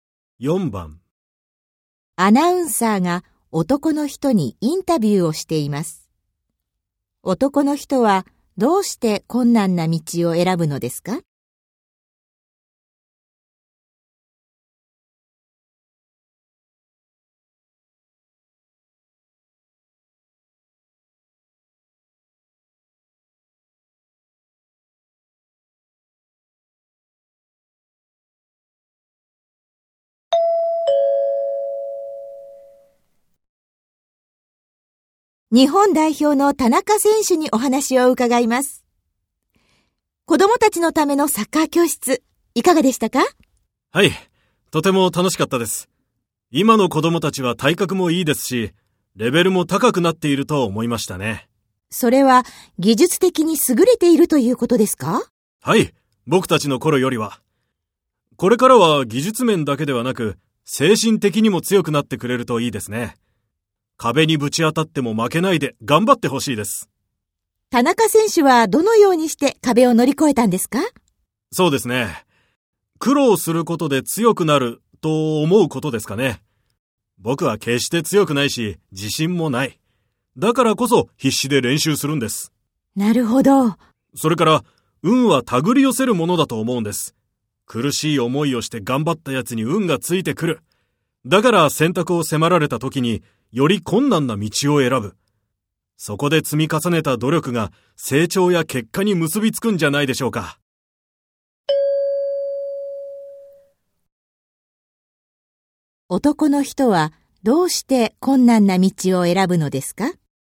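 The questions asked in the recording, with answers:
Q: 男の人はどうして困難な道を選ぶのですか?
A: 苦しい思いをして頑張った人に運がついてきて、そこで積み重ねた努力が成長や結果に結びつくと思うから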